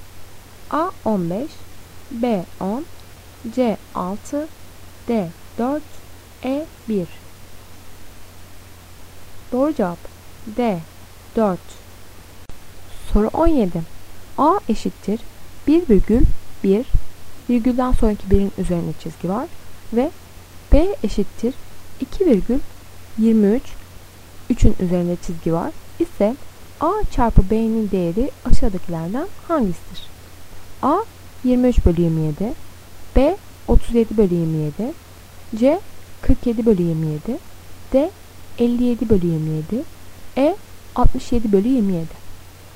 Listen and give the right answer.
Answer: Doğru cevap E 67 bölü 27.